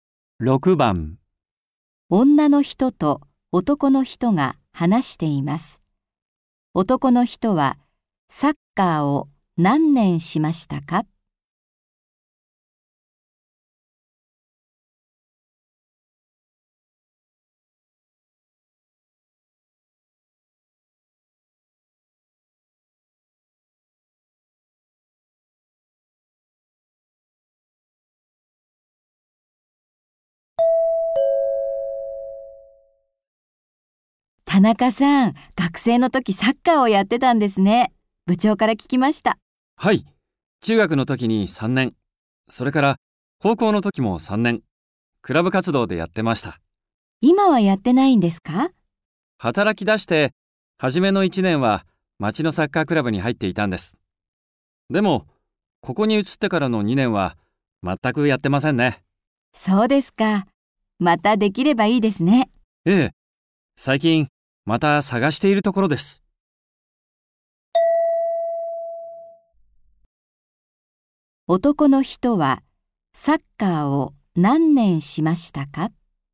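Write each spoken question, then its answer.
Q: 男の人はサッカーを何年しましたか?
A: 7年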